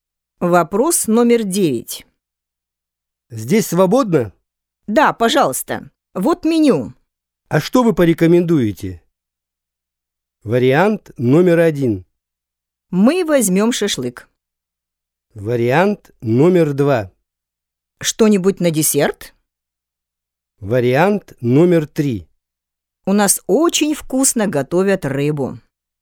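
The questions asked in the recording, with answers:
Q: А что вы порекомендуете?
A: 3: У нас очень вкусно готовят рыбу.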